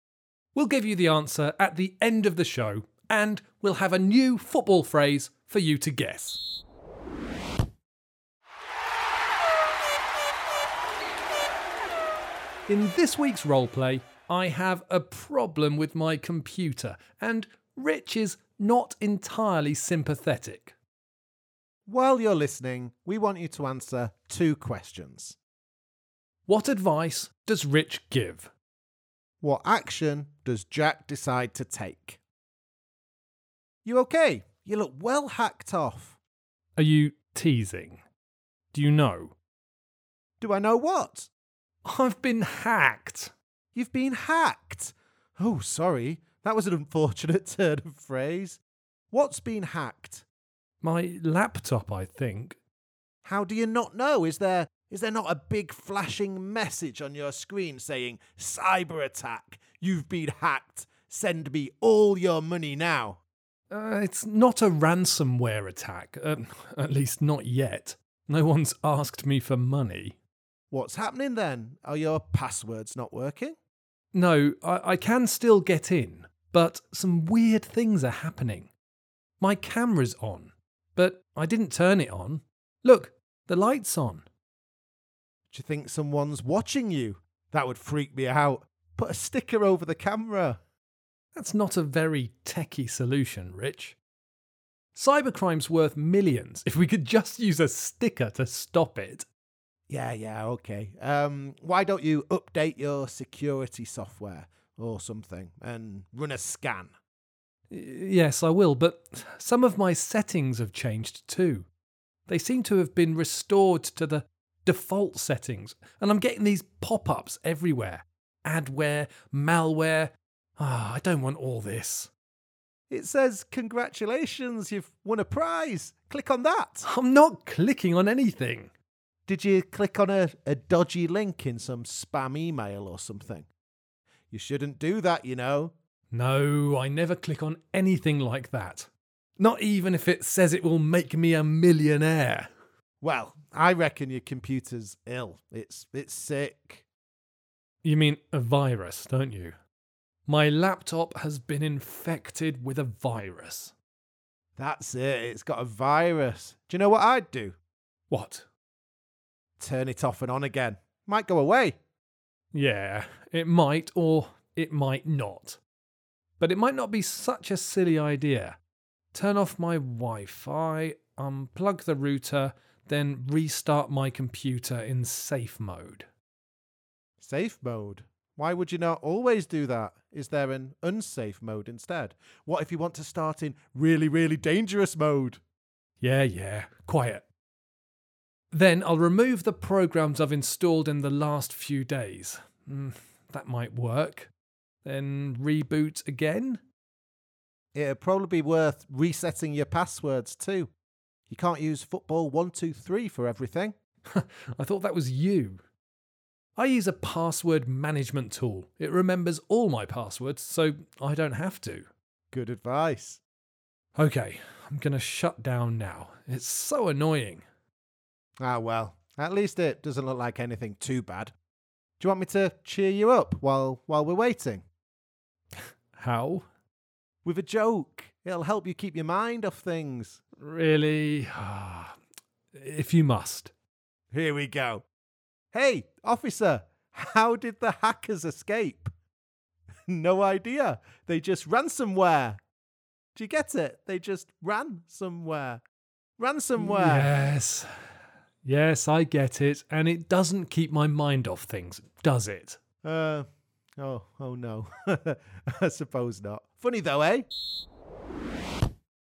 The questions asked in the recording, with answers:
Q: What advice does Rich give?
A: I told you to put a sticker on your camera so cyber criminals couldn't see you.

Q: What action does Jack decide to take?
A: I kind of followed your advice, but I also wanted to start my computer in safe mode and uninstall a few programs.